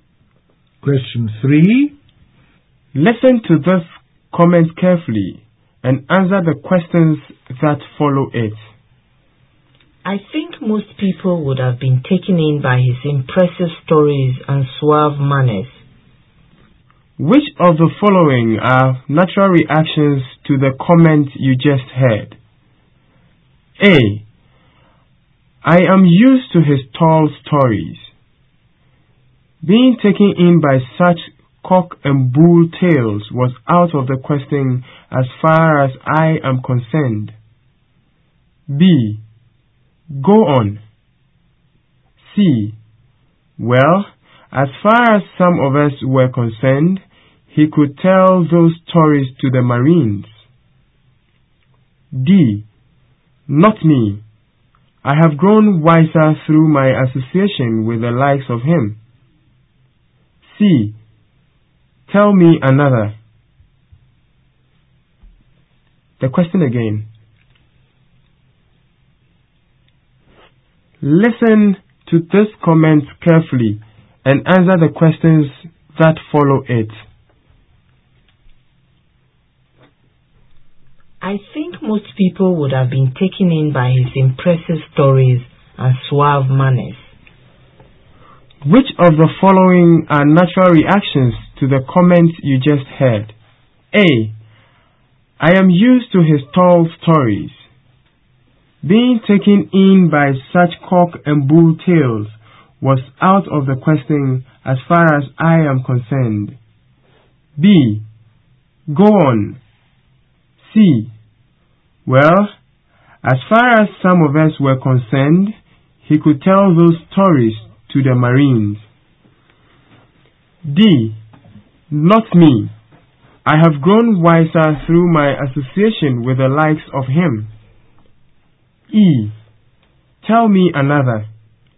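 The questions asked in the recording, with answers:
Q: Which of the following are natural reactions to the comment you just heard?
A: A: I am used to his tall stories; C: he could tell those stories to the Marines; D: Not me. I have grown wiser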